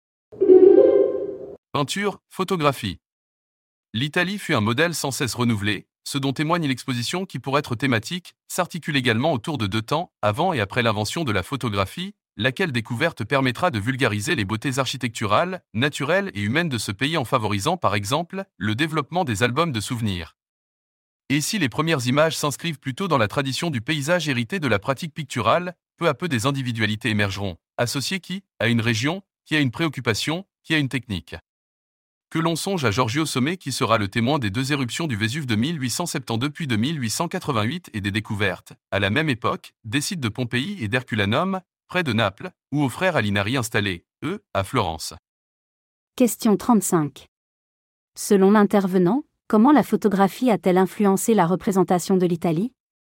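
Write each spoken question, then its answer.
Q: Selon l'intervenant, comment la photographie a-t-elle influencé la représentation de l'Italie ?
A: Elle a permis de vulgariser les beautés du pays, par exemple avec les albums de souvenirs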